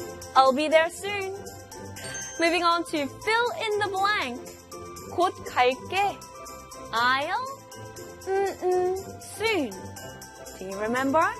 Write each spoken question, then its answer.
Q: 곧 갈게. I'll soon. Do you remember?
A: I will be there soon. I'll be there soon.